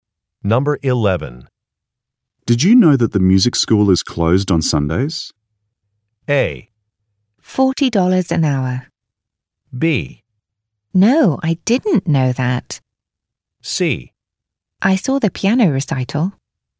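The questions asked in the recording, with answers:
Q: Did you know that the music school is closed on Sundays?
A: B: No, I didn't know that.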